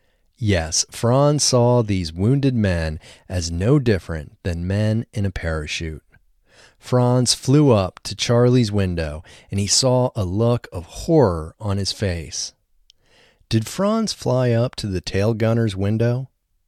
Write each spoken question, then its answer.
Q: Did Franz fly up to the tail gunner's window?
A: No, Franz didn't fly up to the tail gunner's window.